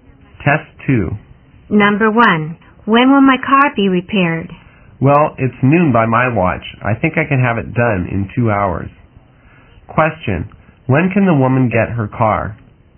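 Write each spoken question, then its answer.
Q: When can the woman get her car?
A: At 2 o'clock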